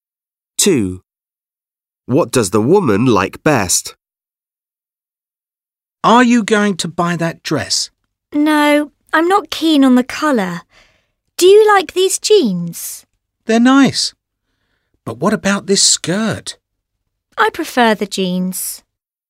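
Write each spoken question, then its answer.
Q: What does the woman like best?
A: the jeans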